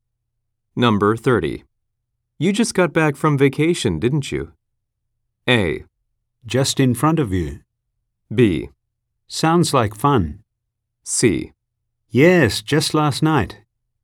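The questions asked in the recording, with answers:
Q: You just got back from vacation, didn't you?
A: C: Yes, just last night.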